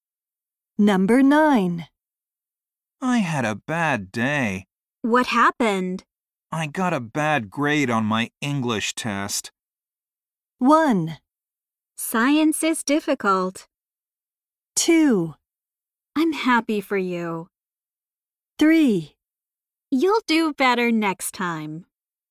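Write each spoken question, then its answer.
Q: I got a bad grade on my English test.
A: 3: You'll do better next time.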